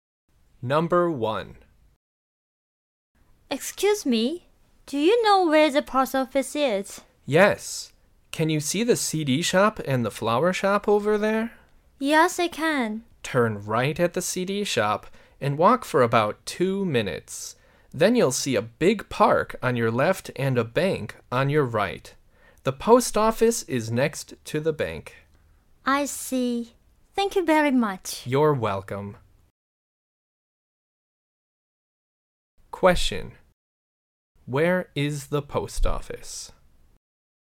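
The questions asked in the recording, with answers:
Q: Where is the post office?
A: Next to the bank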